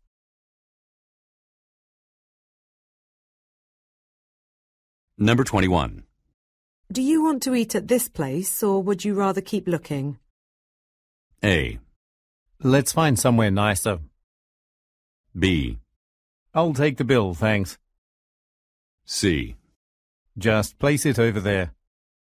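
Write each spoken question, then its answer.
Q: Do you want to eat at this place or would you rather keep looking?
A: A: Let's find somewhere nicer.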